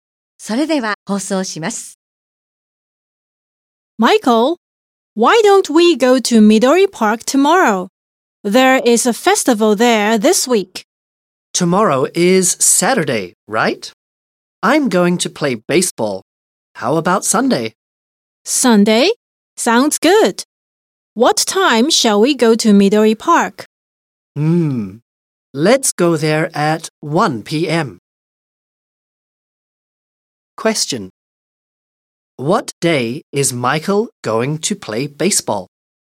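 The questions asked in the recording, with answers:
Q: What day is Michael going to play baseball?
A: Saturday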